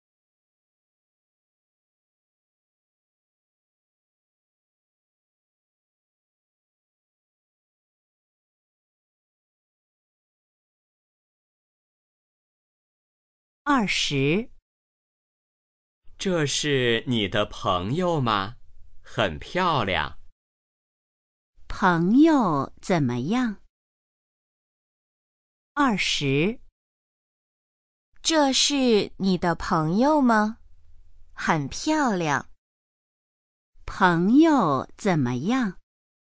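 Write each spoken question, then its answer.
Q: 朋友怎么样?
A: 很漂亮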